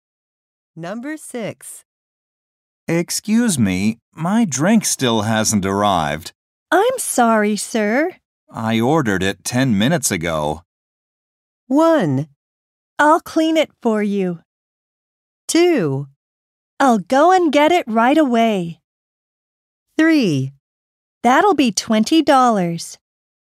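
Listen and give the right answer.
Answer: 2: I'll go and get it right away.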